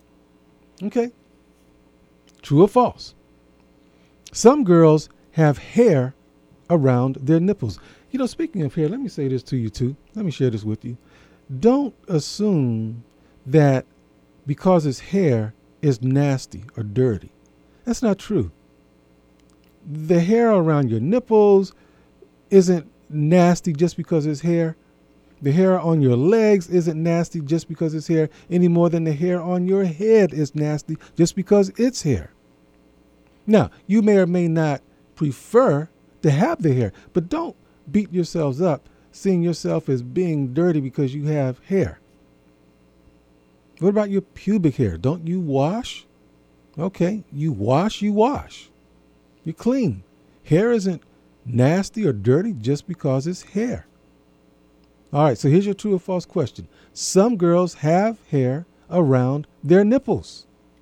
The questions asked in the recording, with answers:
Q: Some girls have hair around their nipples.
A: The correct answer is true.